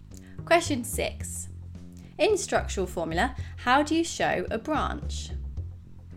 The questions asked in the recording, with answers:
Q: In structural formula, how do you show a branch?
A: Branches are shown with brackets to indicate a branch of the main chain.